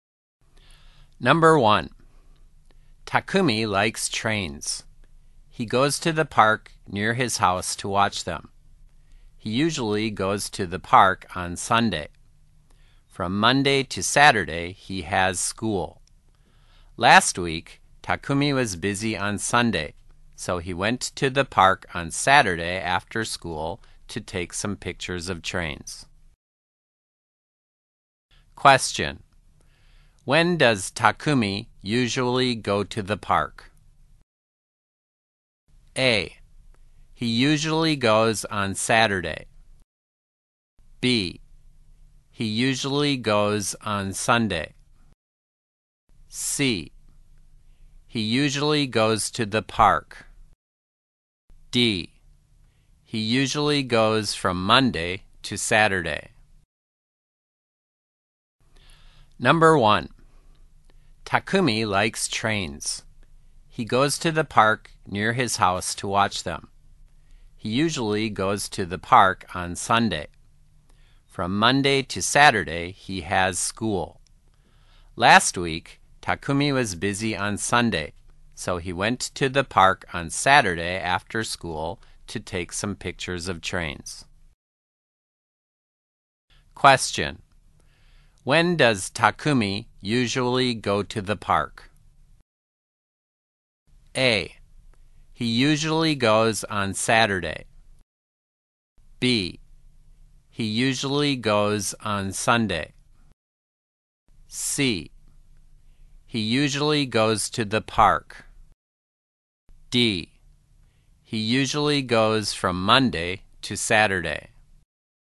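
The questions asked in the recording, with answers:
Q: When does Takumi usually go to the park?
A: B: He usually goes on Sunday.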